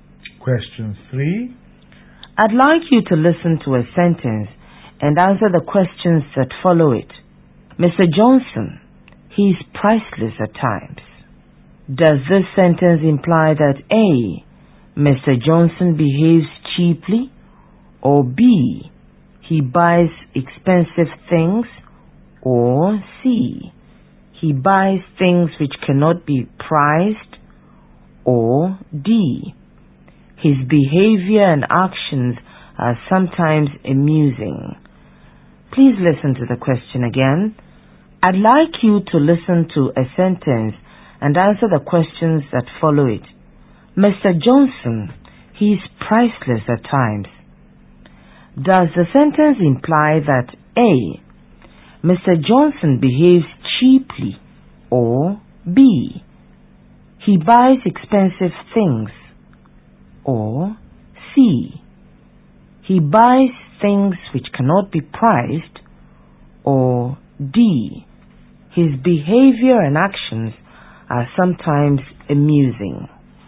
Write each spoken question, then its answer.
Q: Does this sentence imply that A.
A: The sentence implies D, his behavior and actions are sometimes amusing.